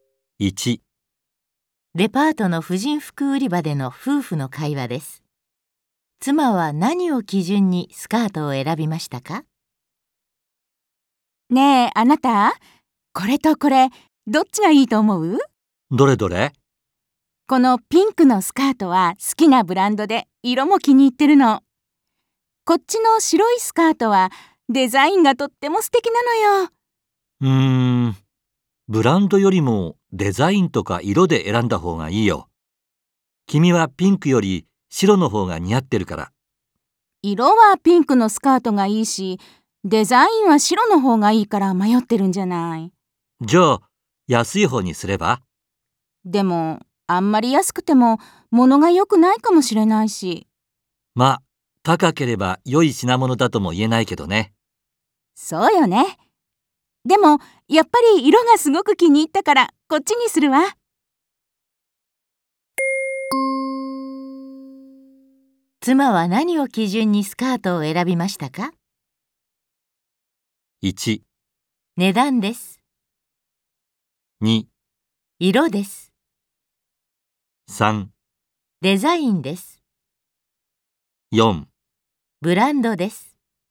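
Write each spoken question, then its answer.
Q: 妻は何を基準にスカートを選びましたか?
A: 2: 色です。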